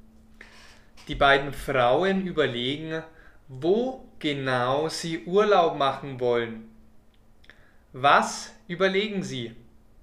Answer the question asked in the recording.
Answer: Sie überlegen, wo genau sie Urlaub machen wollen.